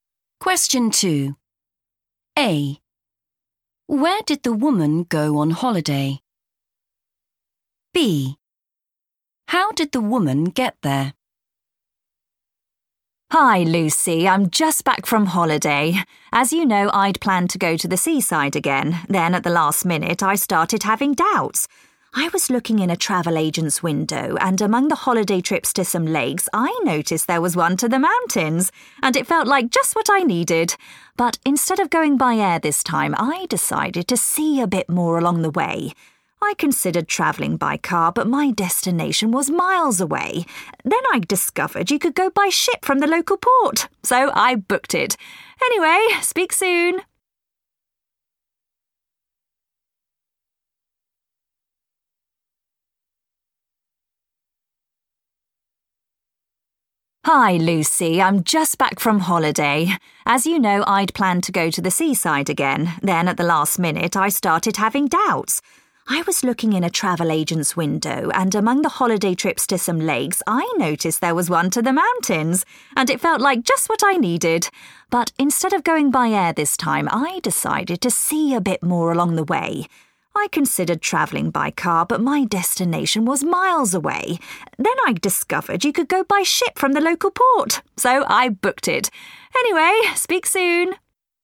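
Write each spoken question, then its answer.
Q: Where did the woman go on holiday?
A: the mountains

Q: How did the woman get there?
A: by ship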